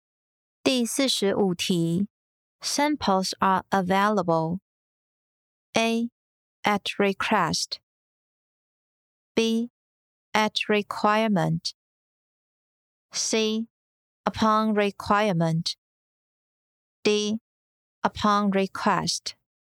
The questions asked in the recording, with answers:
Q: Samples are available.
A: 正确答案为 D. Upon request.